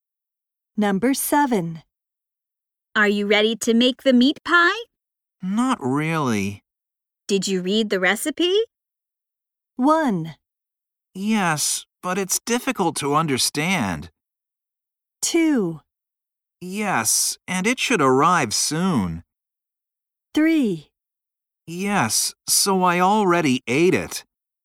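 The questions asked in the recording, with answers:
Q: Did you read the recipe?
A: 1: Yes, but it's difficult to understand.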